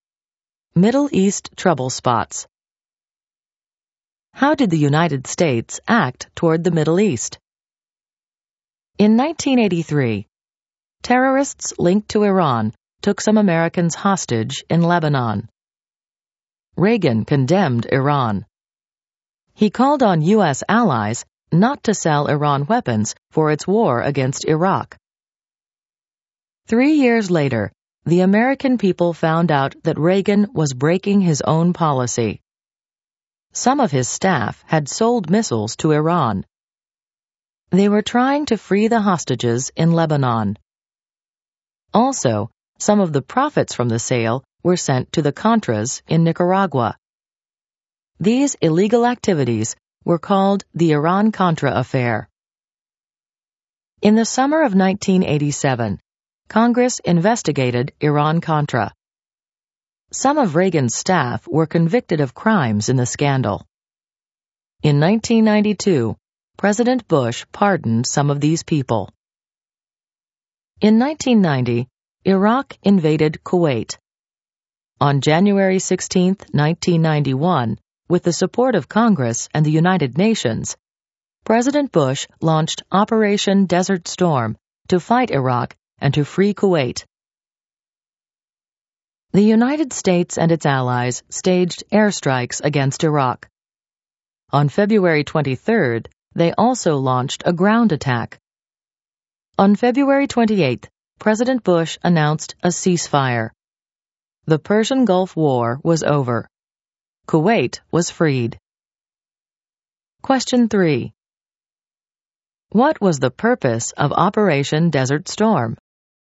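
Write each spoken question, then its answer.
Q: What was the purpose of Operation Desert Storm?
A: To fight Iraq and free Kuwait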